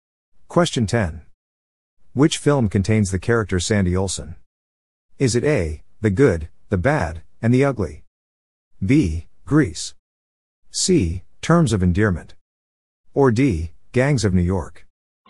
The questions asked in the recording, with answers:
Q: Which film contains the character Sandy Olsson?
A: The answer is B, Grease.